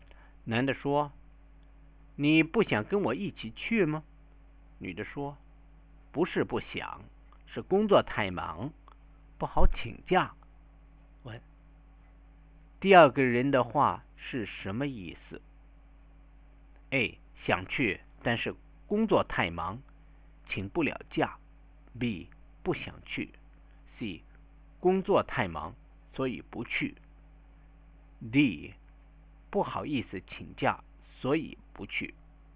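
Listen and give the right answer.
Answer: A: 想去,但是工作太忙,请不了假。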